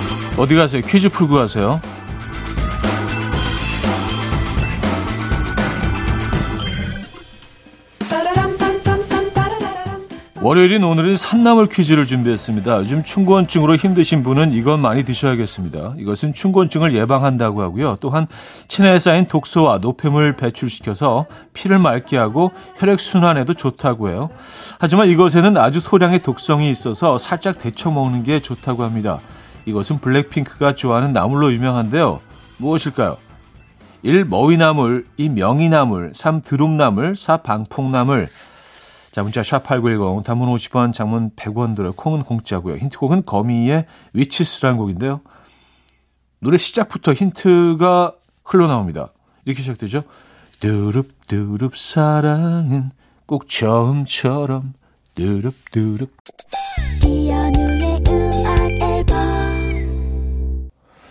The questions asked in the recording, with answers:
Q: 무엇일까요? 1. 머위나물, 2. 명이나물, 3. 드룹나물, 4. 방풍나물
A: 정답은 3번 드룹이었습니다.